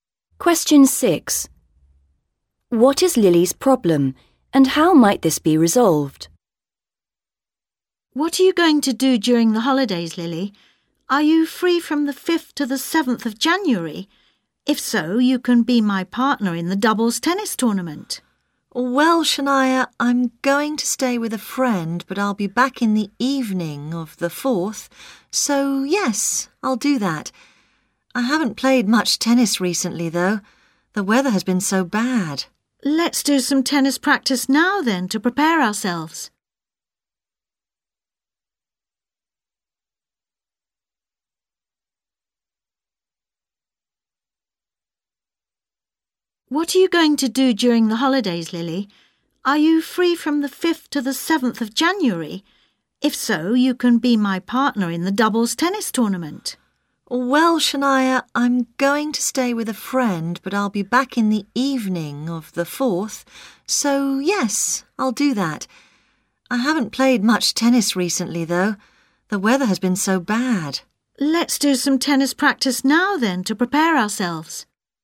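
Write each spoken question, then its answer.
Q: What is Lily's problem, and how might this be resolved?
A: She hasn't played much tennis recently; they can practise now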